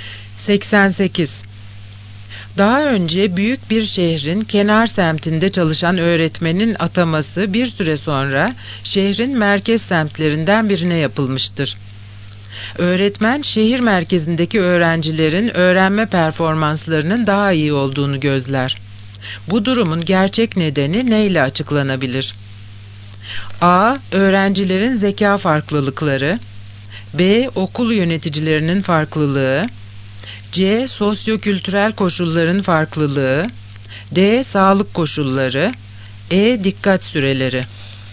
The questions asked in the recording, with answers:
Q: Bu durumun gerçek nedeni neyle açıklanabilir?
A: Yanıt C. Sosyokültürel koşulların farklılığı.